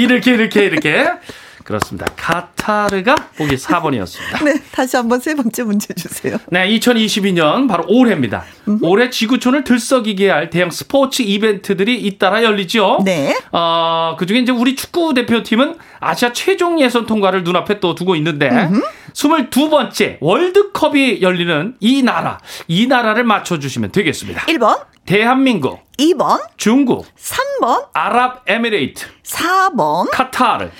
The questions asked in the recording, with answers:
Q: 22번째 월드컵이 열리는 이 나라, 이 나라를 맞춰주시면 되겠습니다.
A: 정답은 정답은 4번 카타르가 정답입니다.